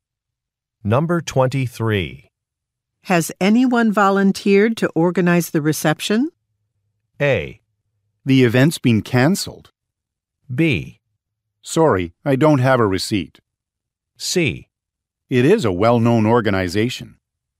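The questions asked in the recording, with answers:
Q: Has anyone volunteered to organize the reception?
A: A: The event's been cancelled.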